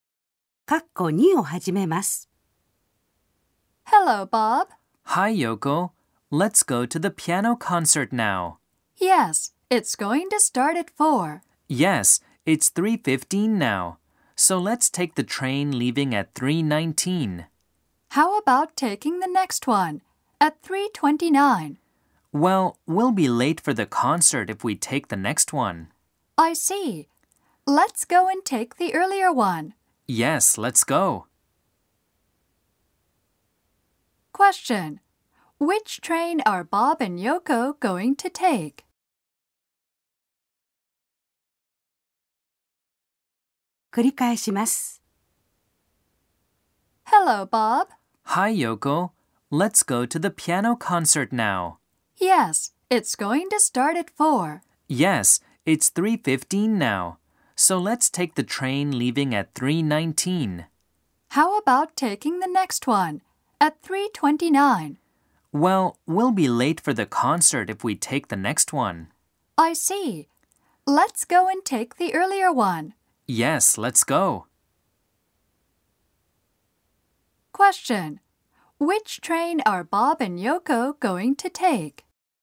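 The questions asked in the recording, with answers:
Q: Which train are Bob and Yoko going to take?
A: The train leaving at 3:19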